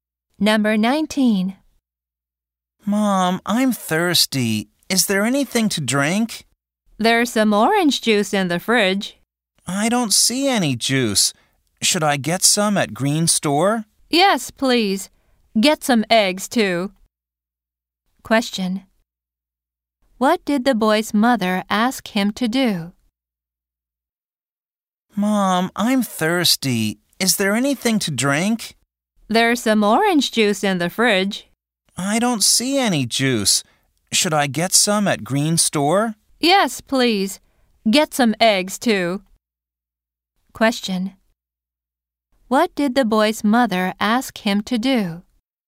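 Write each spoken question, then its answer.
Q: What did the boy's mother ask him to do?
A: Buy juice and eggs at Green Store.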